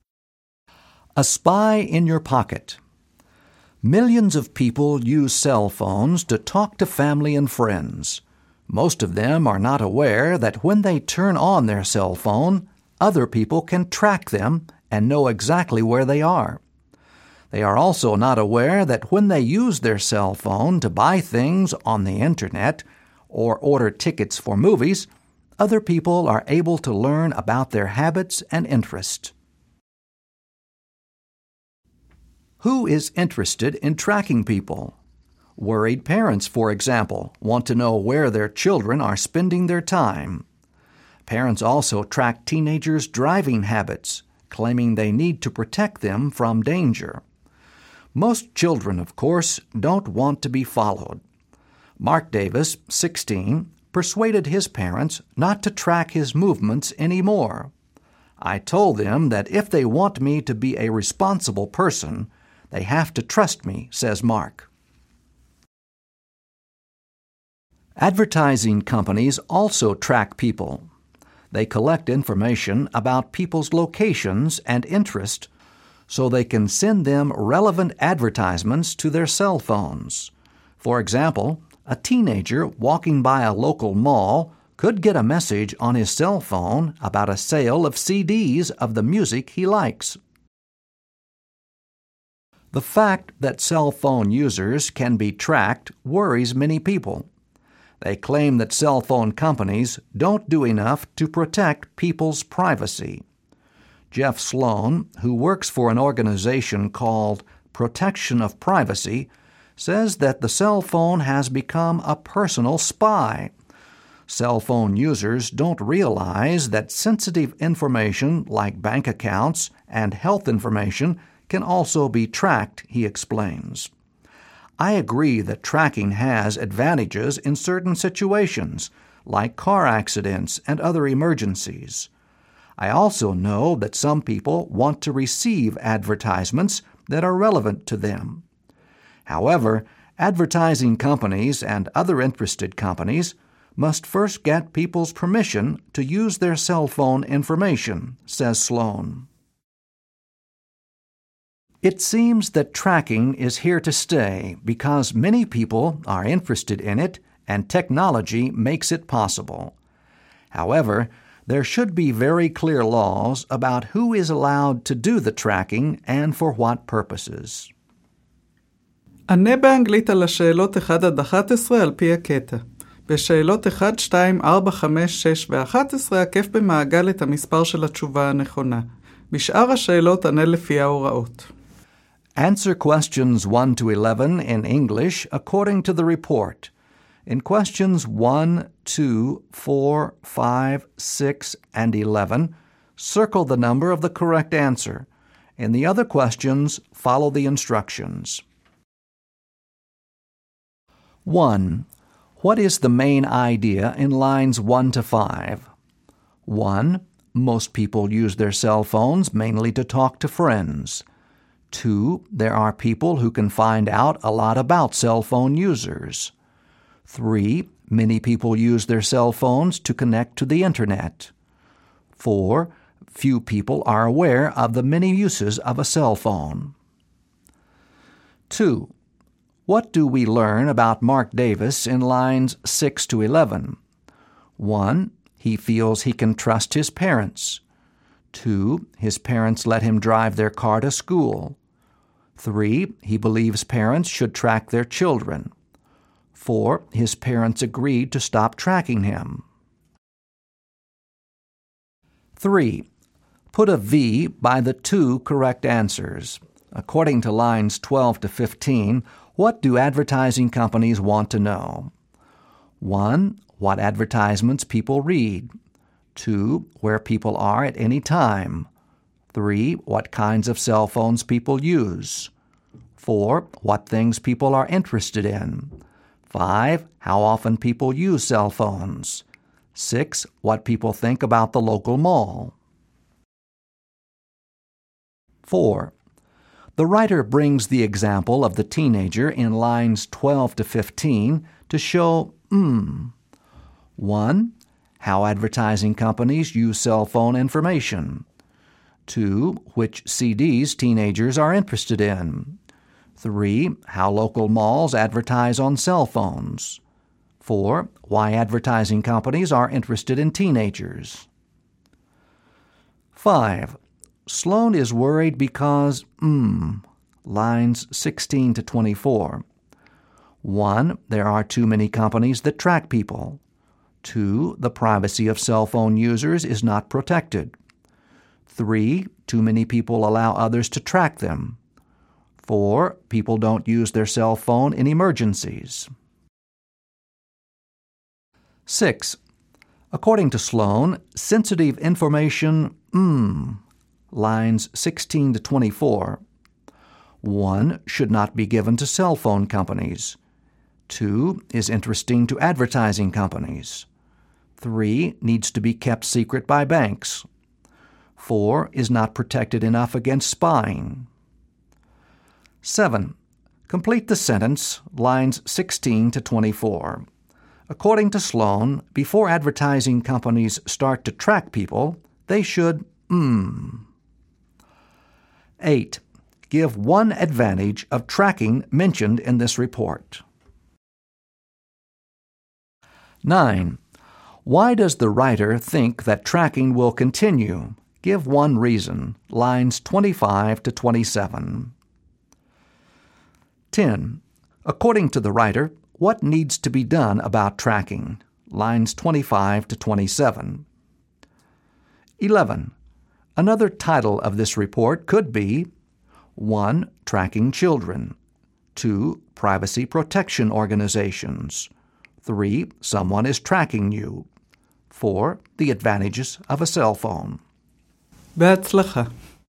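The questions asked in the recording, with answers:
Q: What is the main idea in lines 1 to 5?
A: 2: There are people who can find out a lot about cell phone users.

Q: What do we learn about Mark Davis in lines 6 to 11?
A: 4: His parents agreed to stop tracking him.

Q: According to lines 12 to 15, what do advertising companies want to know?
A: 2: Where people are at any time; 4: What things people are interested in.

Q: The writer brings the example of the teenager in lines 12 to 15 to show 1.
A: 1: How advertising companies use cell phone information.

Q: Sloan is worried because, lines 16 to 24.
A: 2: The privacy of cell phone users is not protected.

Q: According to Sloan, sensitive information, lines 16 to 24.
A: 4: Is not protected enough against spying.

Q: According to Sloan, before advertising companies start to track people, they should 8.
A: first get people's permission to use their cell phone information

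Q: Give one advantage of tracking mentioned in this report.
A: It helps in car accidents and other emergencies.

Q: Why does the writer think that tracking will continue?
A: Many people are interested in it and technology makes it possible.

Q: According to the writer, what needs to be done about tracking?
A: There should be very clear laws about who may track and for what purposes.

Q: Another title of this report could be 1.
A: 3: Someone is tracking you.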